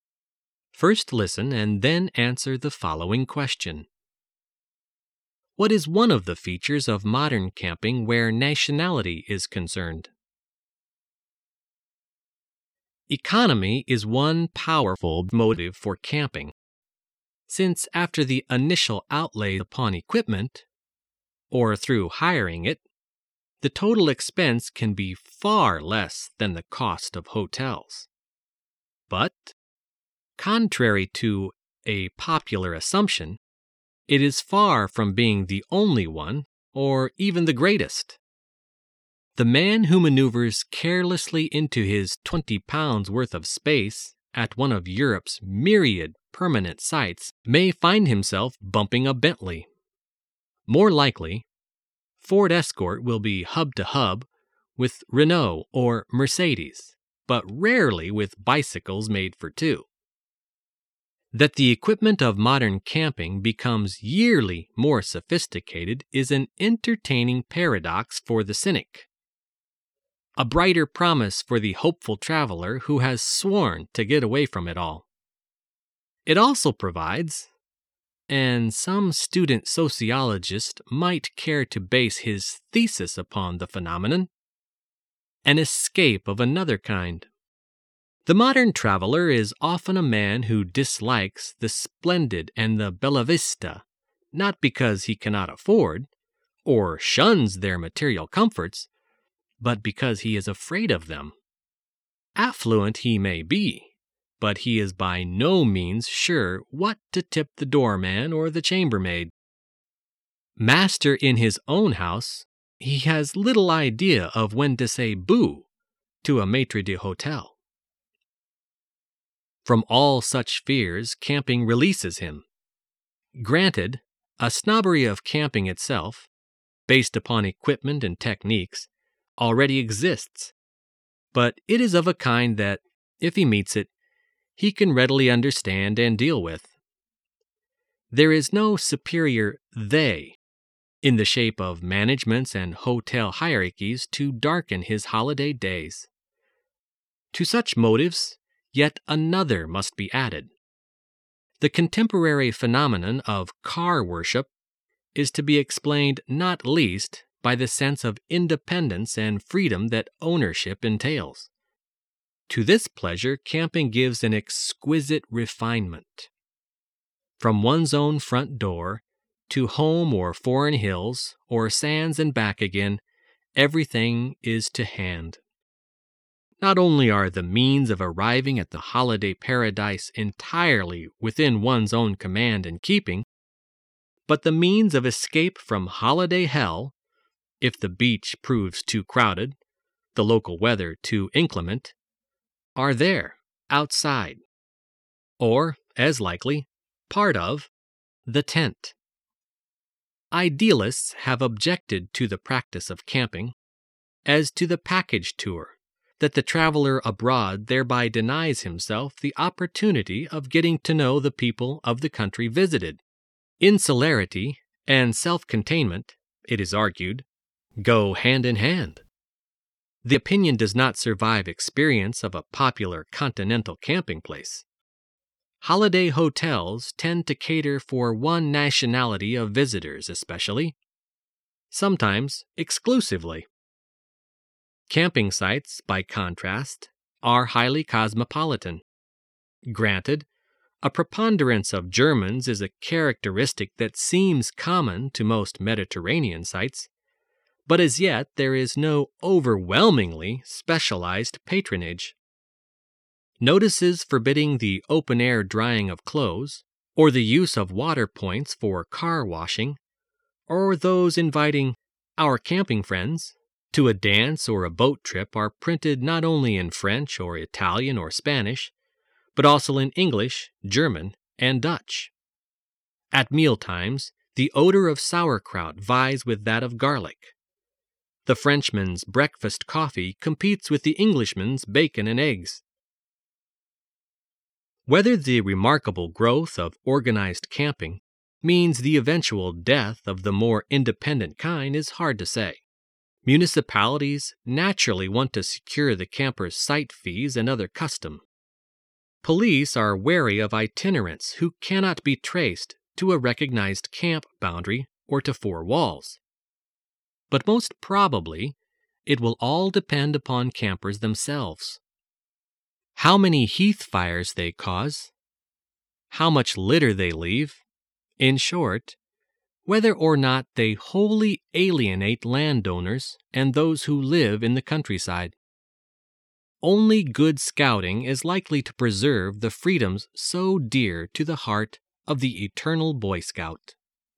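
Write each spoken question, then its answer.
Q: What is one of the features of modern camping where nationality is concerned?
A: Camping sites are highly cosmopolitan, not catering to one nationality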